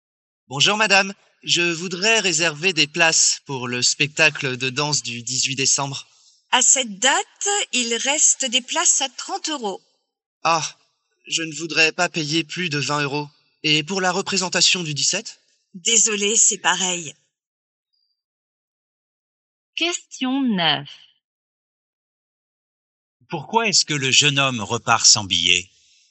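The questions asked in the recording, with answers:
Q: Pourquoi est-ce que le jeune homme repart sans billet?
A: Parce que les places sont trop chères (30 euros, il ne veut pas payer plus de 20 euros).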